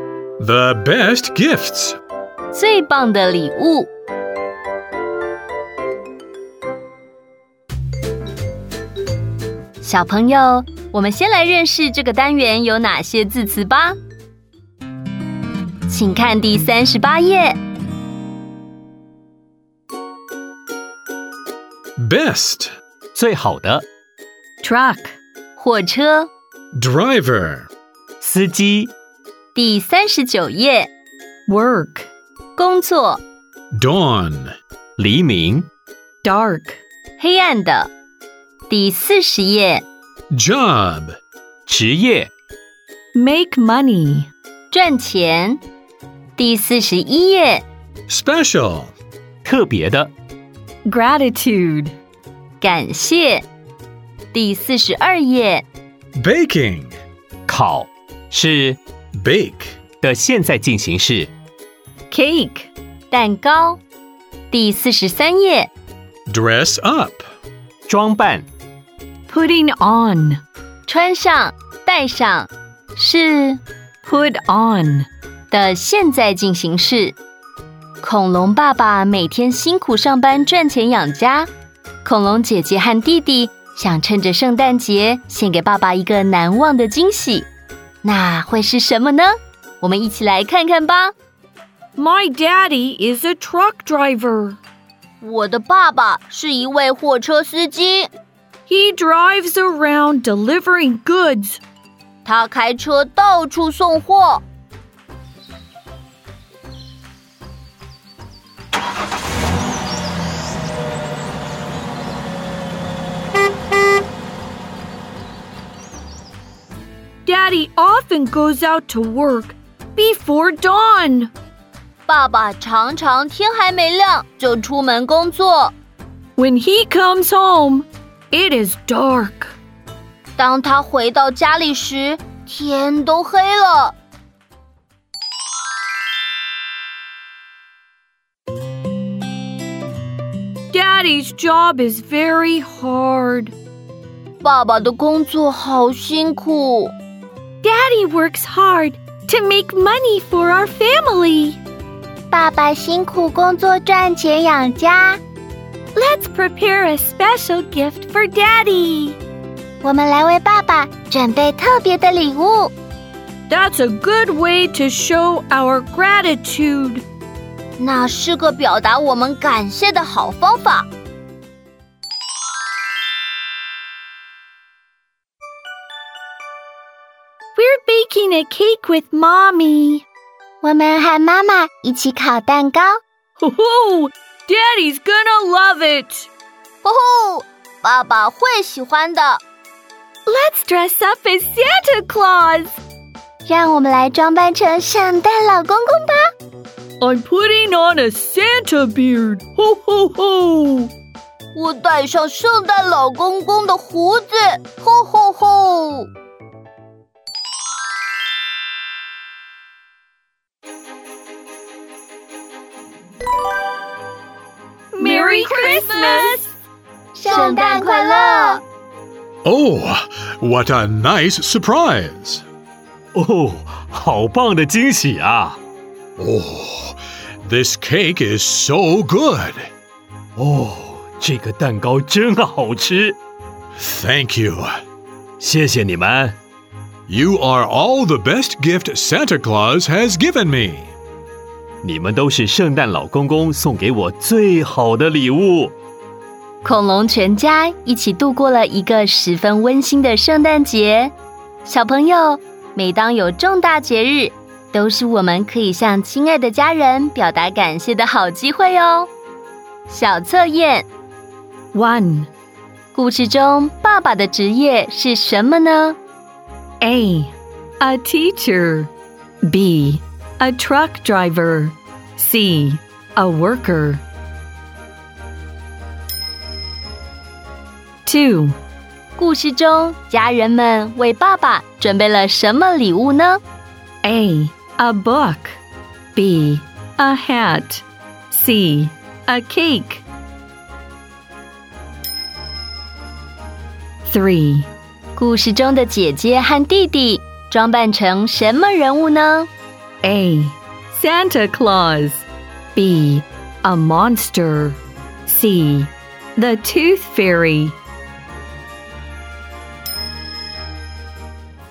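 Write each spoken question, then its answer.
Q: 故事中爸爸的职业是什么呢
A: B: A truck driver

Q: 故事中家人们为爸爸准备了什么礼物呢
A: C: A cake

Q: 故事中的姐姐和弟弟装扮成什么人物呢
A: A: Santa Claus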